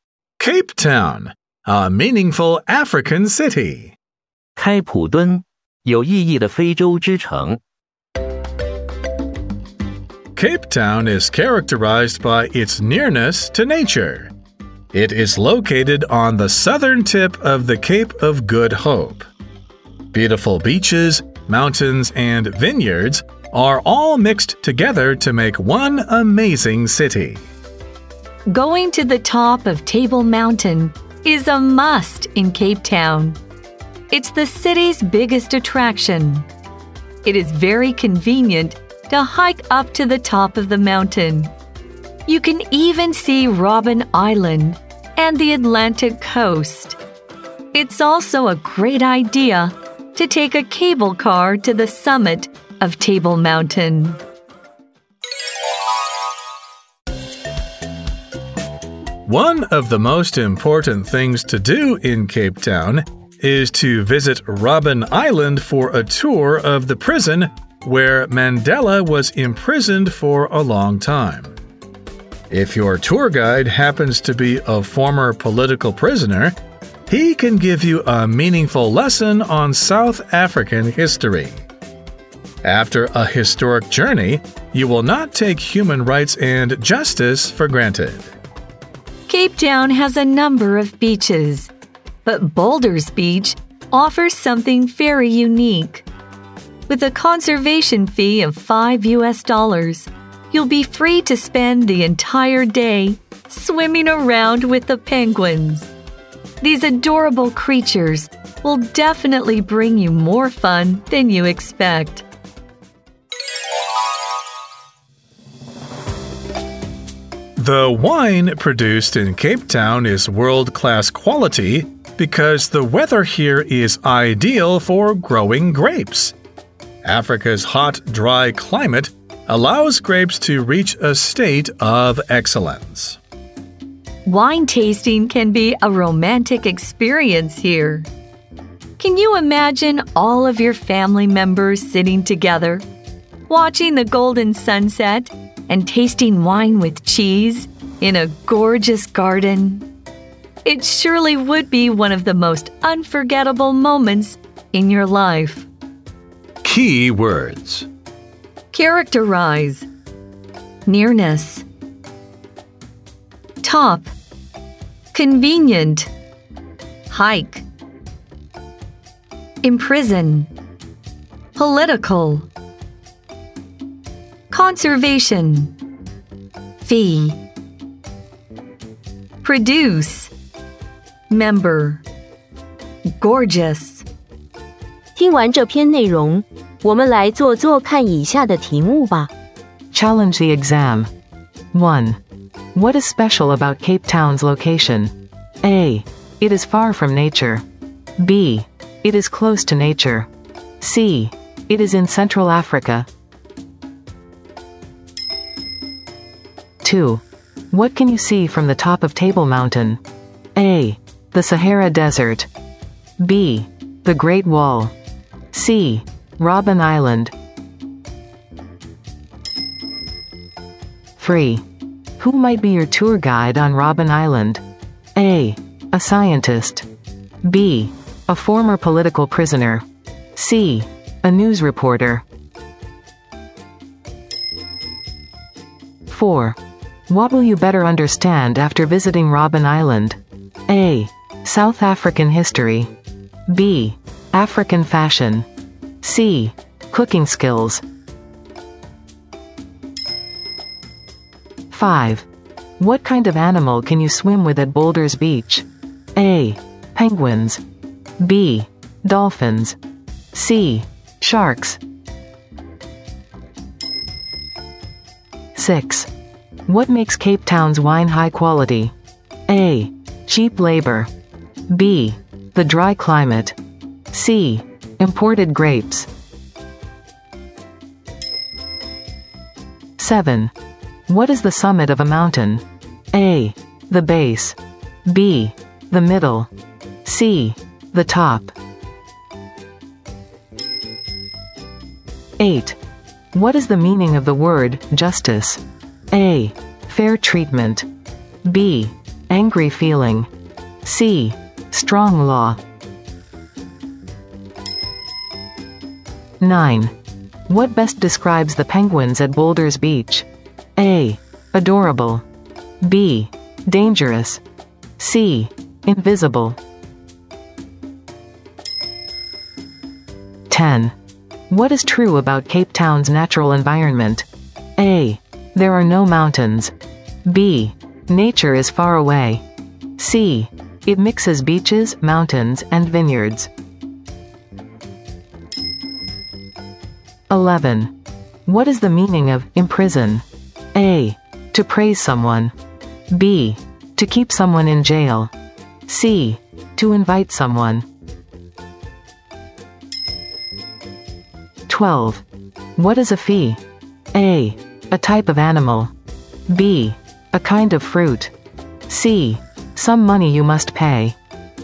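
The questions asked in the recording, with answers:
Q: What is special about Cape Town's location?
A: B: It is close to nature.

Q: What can you see from the top of Table Mountain?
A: C: Robben Island.

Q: Who might be your tour guide on Robben Island?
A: B: A former political prisoner.

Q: What will you better understand after visiting Robben Island?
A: A: South African history.

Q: What kind of animal can you swim with at Boulders Beach?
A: A: Penguins.

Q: What makes Cape Town's wine high quality?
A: B: The dry climate.

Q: What is the summit of a mountain?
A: C: The top.

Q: What best describes the penguins at Boulder's Beach?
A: A: Adorable.

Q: What is true about Cape Town's natural environment?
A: C: It mixes beaches, mountains, and vineyards.

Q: What is the meaning of imprison?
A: B: To keep someone in jail.

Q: What is a fee?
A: C: Some money you must pay.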